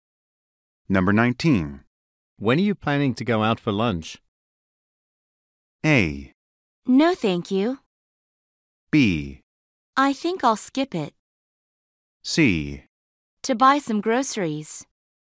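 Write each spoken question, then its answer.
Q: When are you planning to go out for lunch?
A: B: I think I'll skip it.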